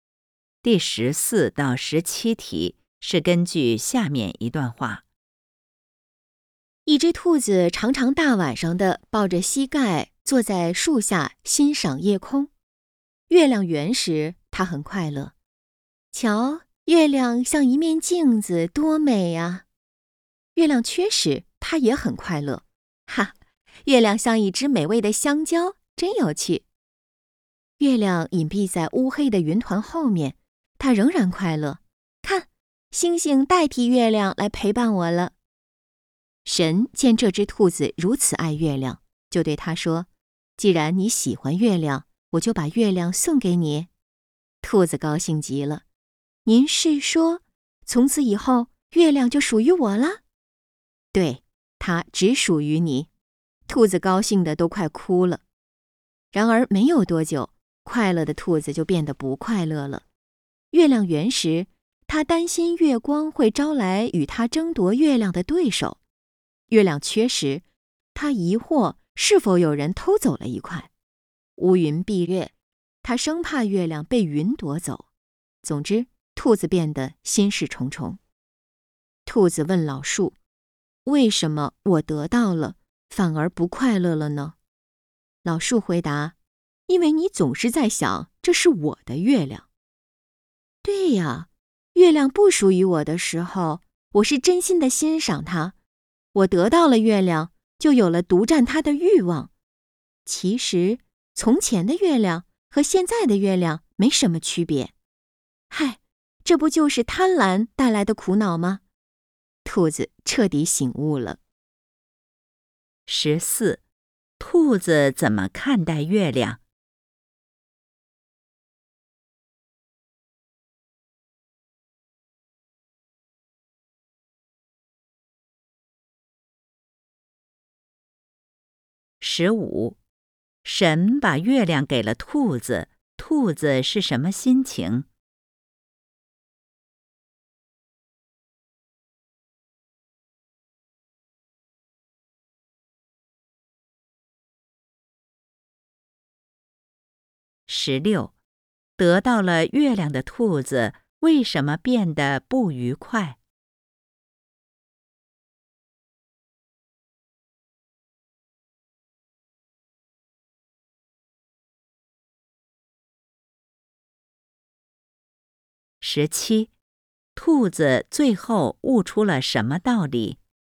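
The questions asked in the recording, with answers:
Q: 兔子怎么看待月亮?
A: 无论月圆月缺都很喜欢、欣赏月亮

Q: 神把月亮给了兔子,兔子是什么心情?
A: 高兴极了

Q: 得到了月亮的兔子为什么变得不愉快?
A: 他担心月亮被别人夺走,有了独占的欲望

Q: 兔子最后悟出了什么道理?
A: 贪婪会带来苦恼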